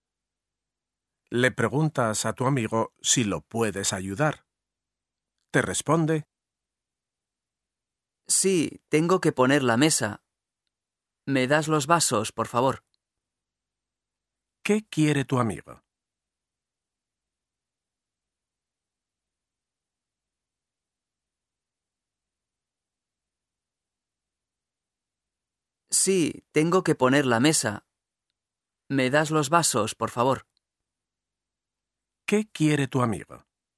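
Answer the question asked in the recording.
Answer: Los vasos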